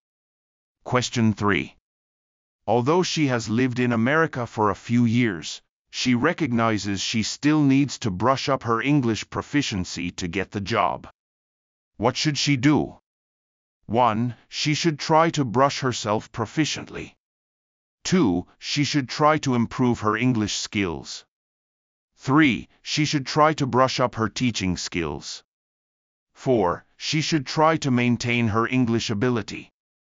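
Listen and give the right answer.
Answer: 2: She should try to improve her English skills.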